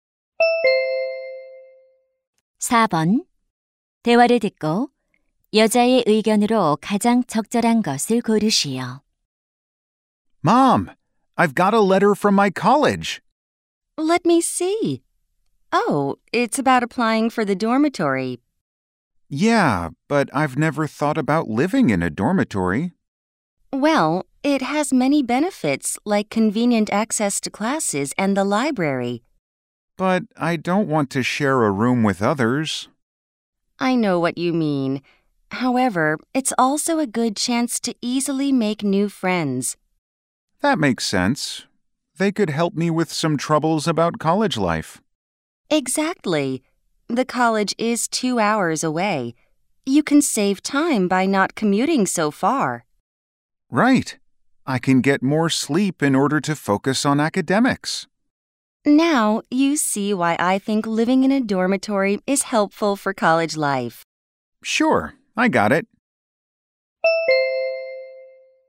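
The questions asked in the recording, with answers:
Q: 대화를 듣고 여자의 의견으로 가장 적절한 것을 고르시오.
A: 기숙사 생활은 대학 생활에 도움이 된다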